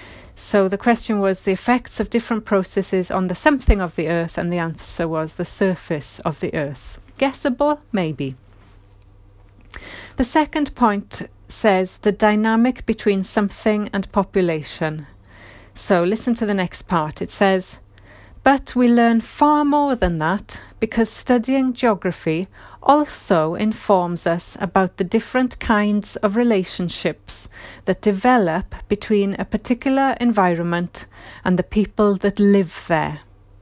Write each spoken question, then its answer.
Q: the dynamic between something and population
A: environment, is the answer